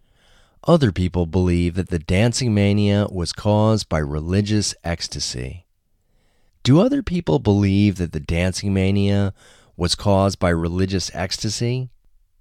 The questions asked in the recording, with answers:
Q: Do other people believe that the Dancing Mania was caused by religious ecstasy?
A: Yes, other people believe that the Dancing Mania was caused by religious ecstasy.